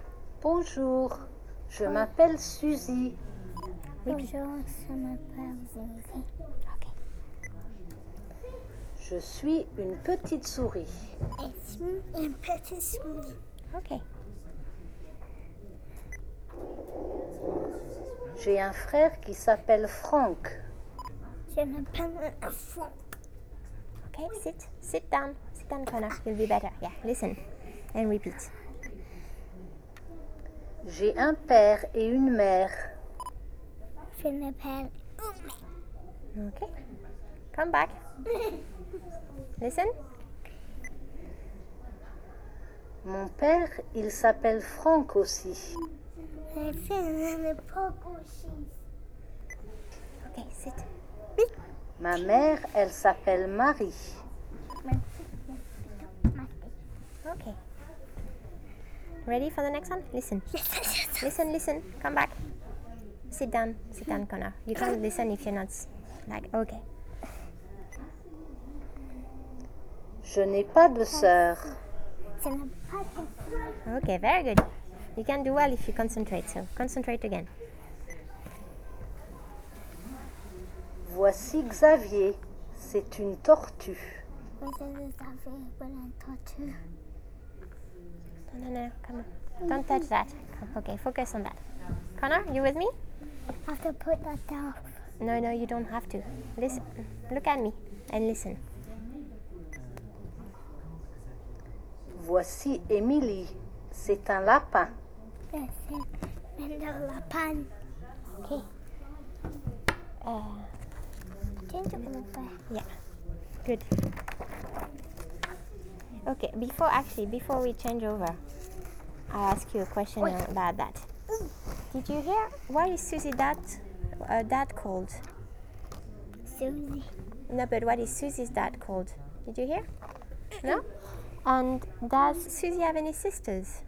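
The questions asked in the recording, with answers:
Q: what is Susie's dad called?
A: Franck

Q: And does Susie have any sisters?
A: No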